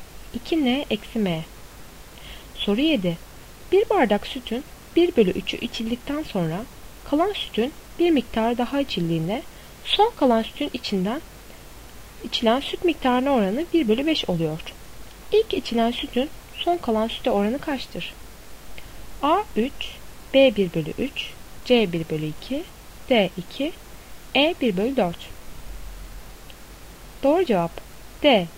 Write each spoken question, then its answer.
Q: İlk içilen sütün son kalan süte oranı kaçtır?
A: Doğru cevap D. 2.